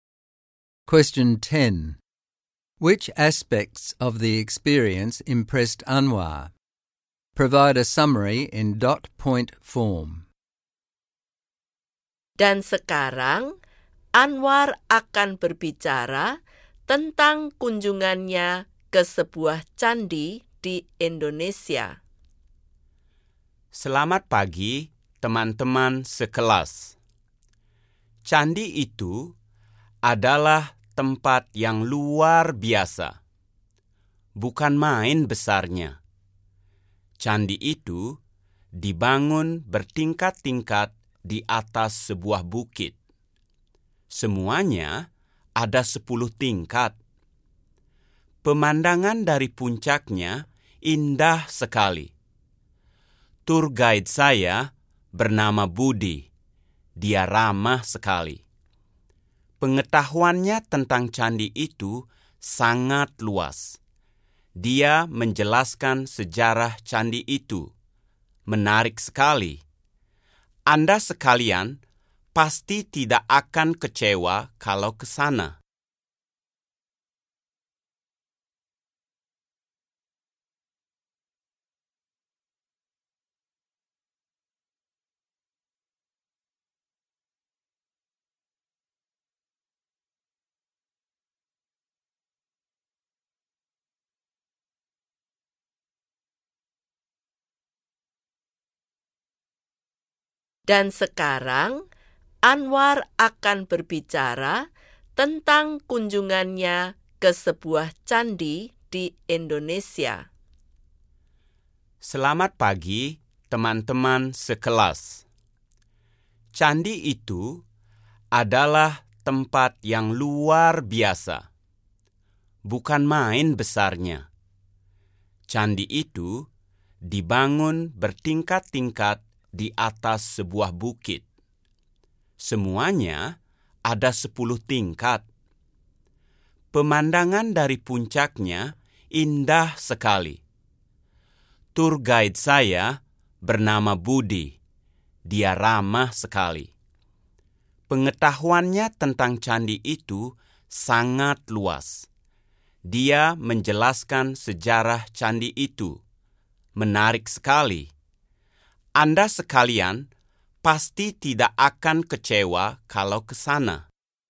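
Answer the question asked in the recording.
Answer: The temple's huge size and ten levels on a hill, the beautiful view from the top, and the friendly, knowledgeable guide who explained its history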